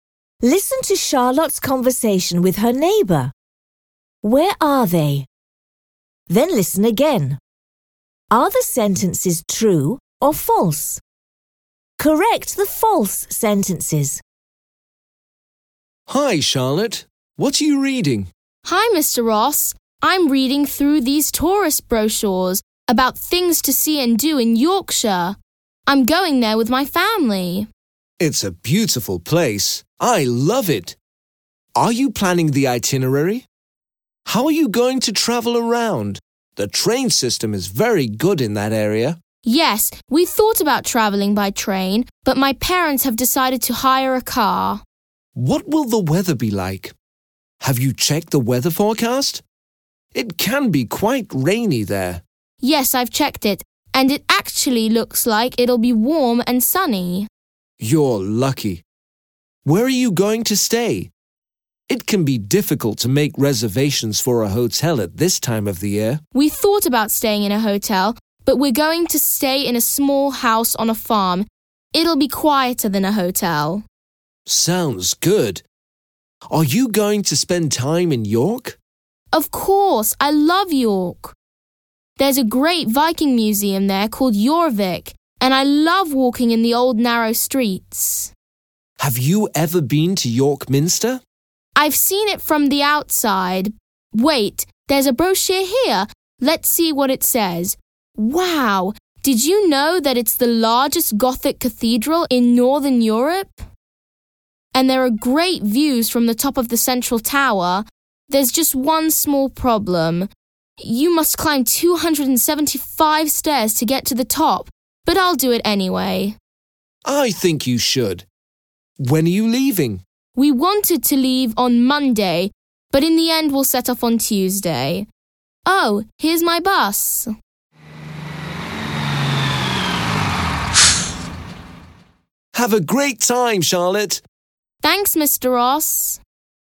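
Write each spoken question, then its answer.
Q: Where are they?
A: At a bus stop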